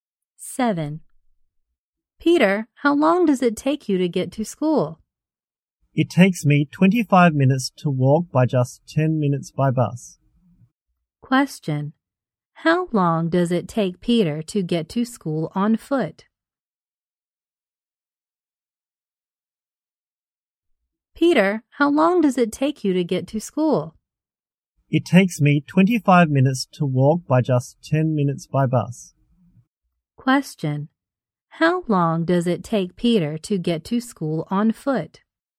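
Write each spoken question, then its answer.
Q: How long does it take Peter to get to school on foot?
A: 25 minutes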